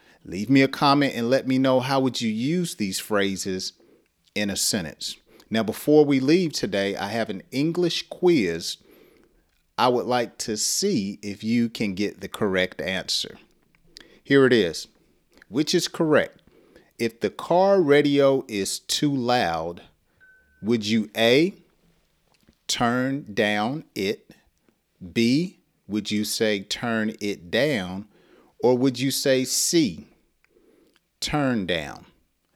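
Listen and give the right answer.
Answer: B: turn it down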